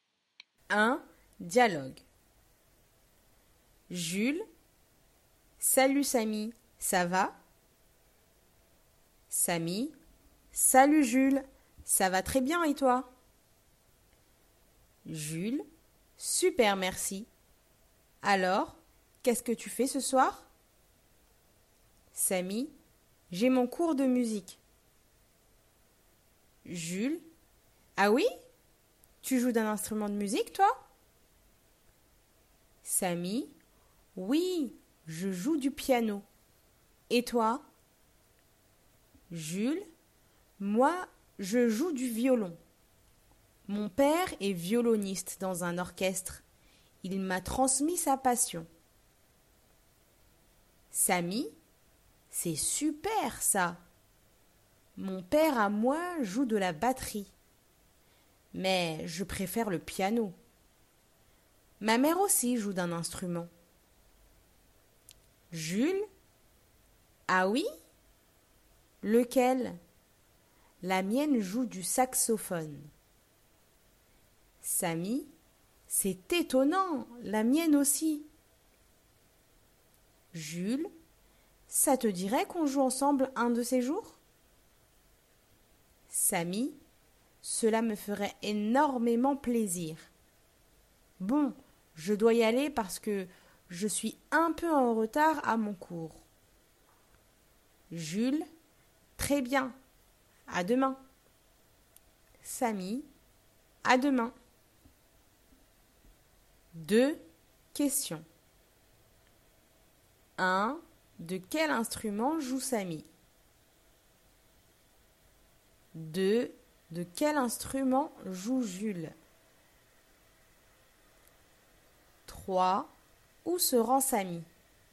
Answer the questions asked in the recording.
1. Il joue du piano.
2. Il joue du violon.
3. Il se rend à son cours de musique.